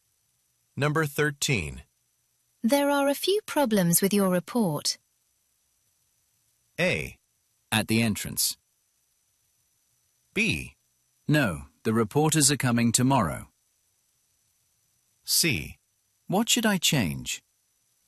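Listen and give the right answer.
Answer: C: What should I change?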